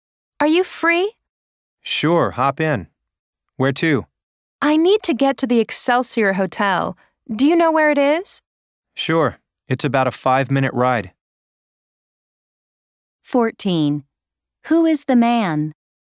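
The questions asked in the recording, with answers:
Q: Who is the man?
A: A taxi driver.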